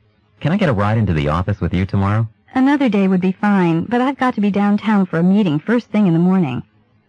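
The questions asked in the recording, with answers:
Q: What does the woman imply?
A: She can't give him a ride tomorrow because she has an early meeting downtown.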